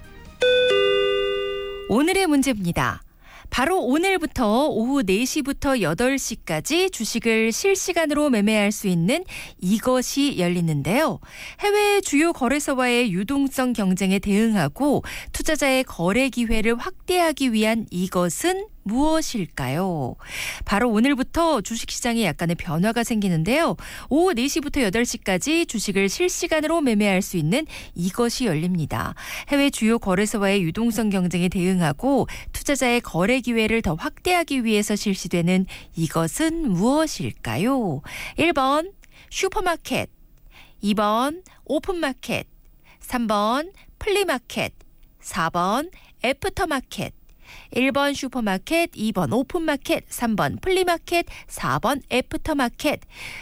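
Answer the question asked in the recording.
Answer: 4: 애프터마켓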